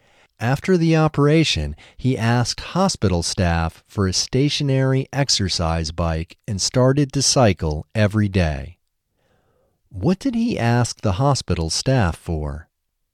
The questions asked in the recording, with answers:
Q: What did he ask the hospital staff for?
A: He asked the hospital staff for a stationary exercise bike.